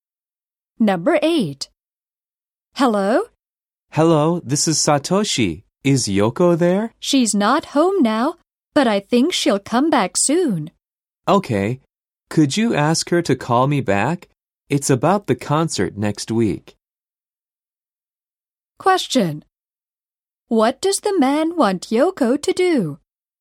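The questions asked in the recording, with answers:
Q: What does the man want Yoko to do?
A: Call him back.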